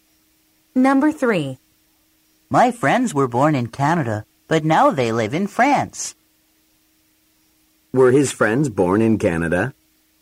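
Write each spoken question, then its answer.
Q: Were his friends born in Canada?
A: Yes, they were.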